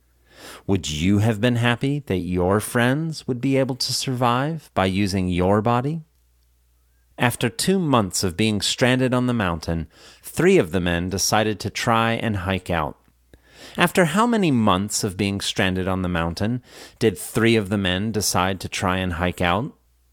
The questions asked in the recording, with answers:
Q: After how many months of being stranded on the mountain did three of the men decide to try and hike out?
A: After 2 months of being stranded on the mountain, three of the men decided to try and hike out.